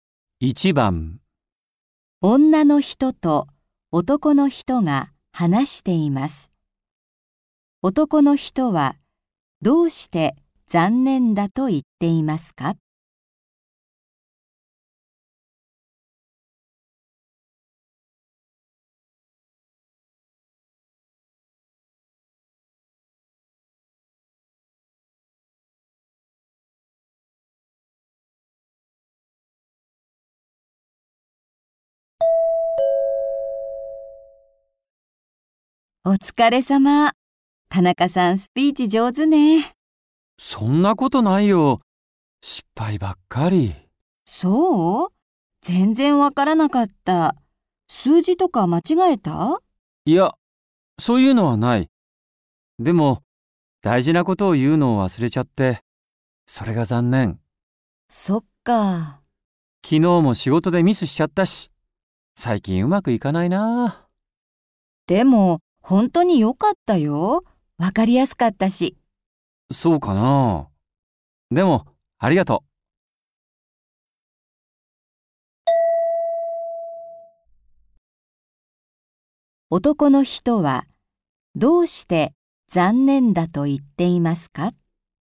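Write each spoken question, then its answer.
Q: 男の人はどうして残念だと言っていますか?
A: スピーチで大事なことを言うのを忘れたから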